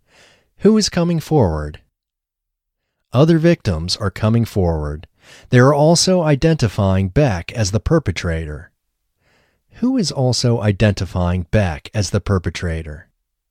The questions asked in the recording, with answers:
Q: Who is also identifying Beck as the perpetrator?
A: The other victims are also identifying Beck as the perpetrator.